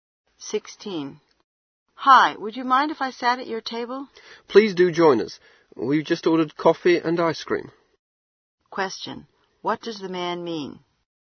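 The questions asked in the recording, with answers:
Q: What does the man mean?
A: The woman is welcome to sit at their table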